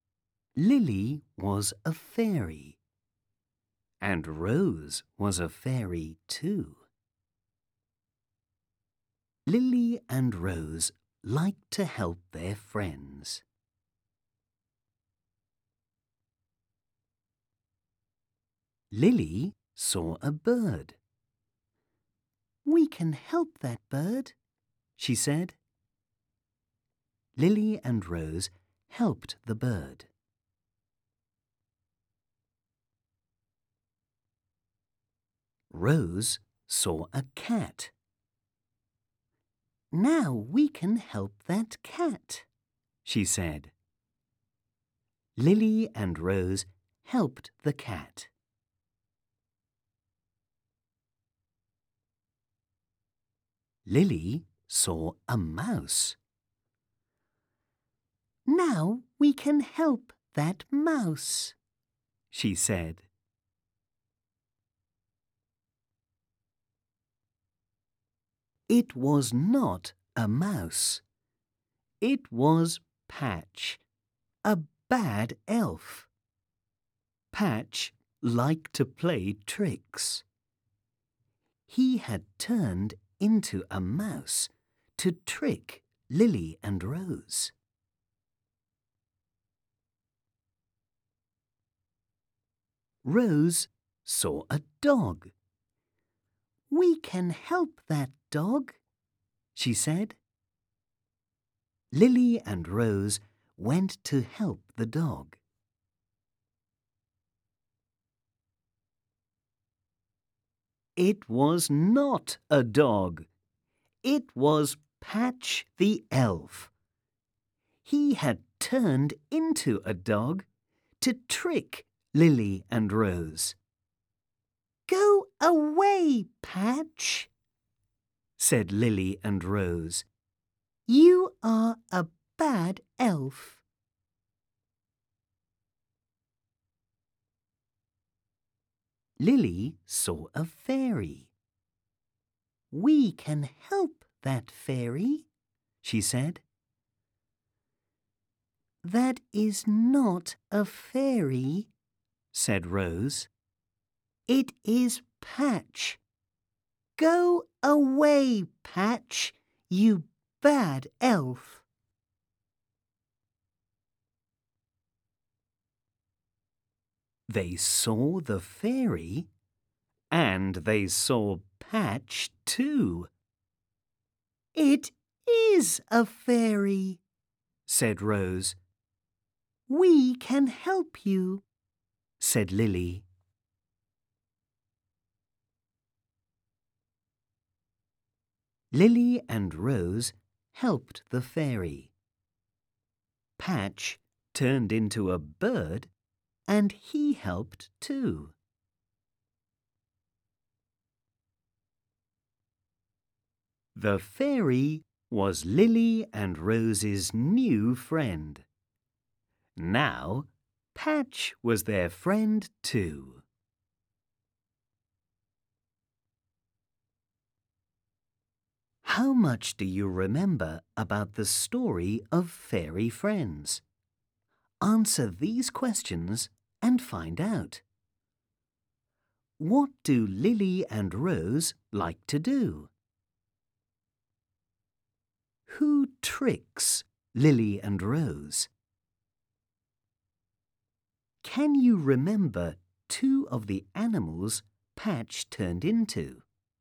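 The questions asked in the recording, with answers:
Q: What do Lily and Rose like to do?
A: Help their friends

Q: Who tricks Lily and Rose?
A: Patch the Elf

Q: Can you remember two of the animals Patch turned into?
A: A mouse and a dog (also a bird)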